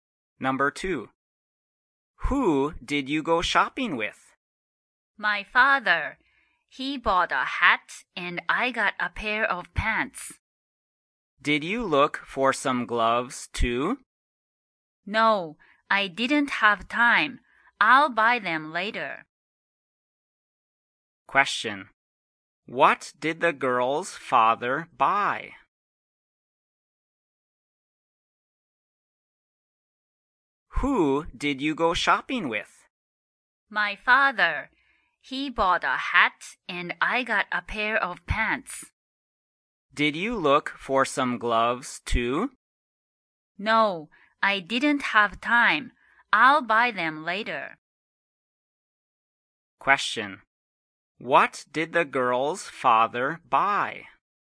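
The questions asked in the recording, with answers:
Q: What did the girl's father buy?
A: A hat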